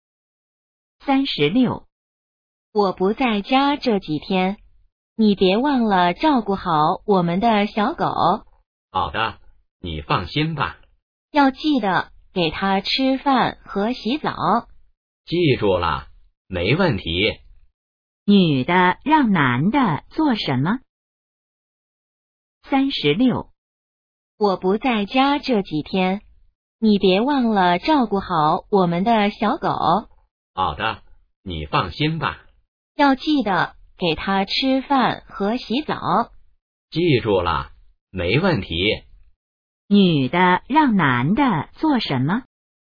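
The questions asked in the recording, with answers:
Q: 女的让男的做什么?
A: 照顾小狗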